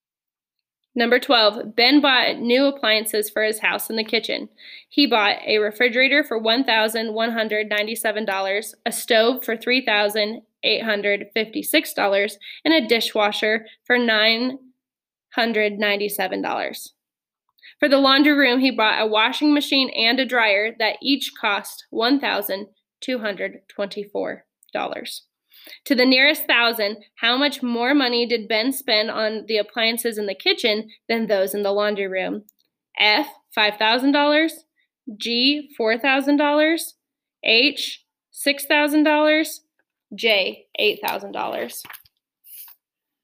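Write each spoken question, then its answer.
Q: To the nearest thousand, how much more money did Ben spend on the appliances in the kitchen than those in the laundry room?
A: G: $4,000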